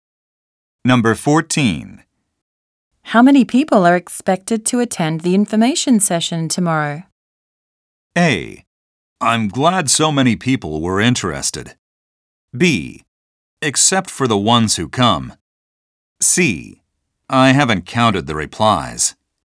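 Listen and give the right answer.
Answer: C: I haven't counted the replies.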